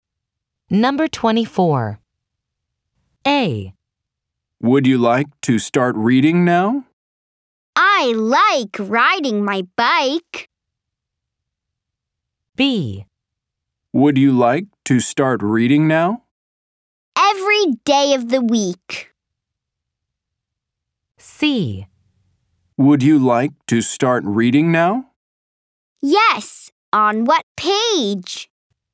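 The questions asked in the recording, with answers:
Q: Would you like to start reading now?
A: C: Yes, on what page?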